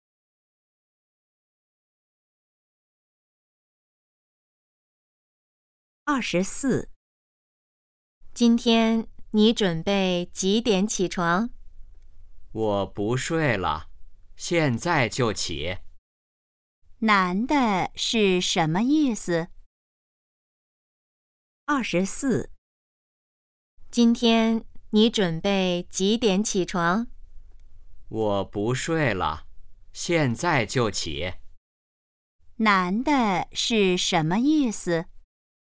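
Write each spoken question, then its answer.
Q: 男的是什么意思?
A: 他现在就起床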